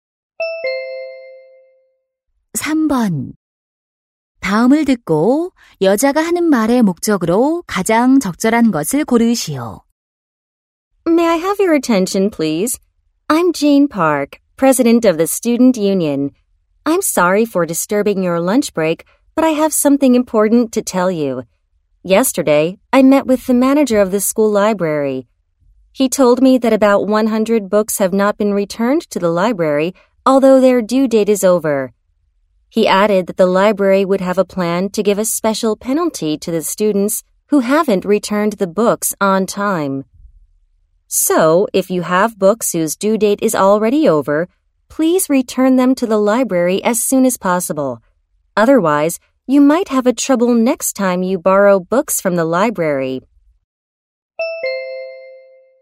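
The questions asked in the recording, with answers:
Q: 다음을 듣고 여자가 하는 말의 목적으로 가장 적절한 것을 고르시오.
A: 연체된 도서를 빨리 도서관에 반납하도록 요청하려고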